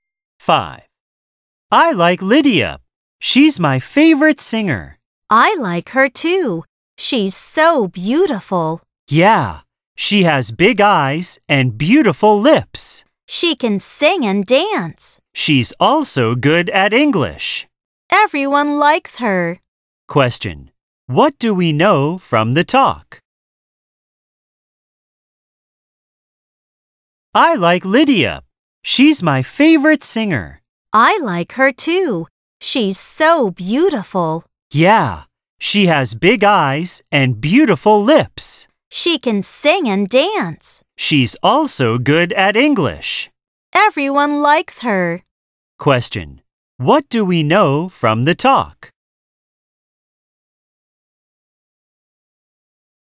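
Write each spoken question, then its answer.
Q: What do we know from the talk?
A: Lydia is a beautiful singer who can sing, dance and speak English well.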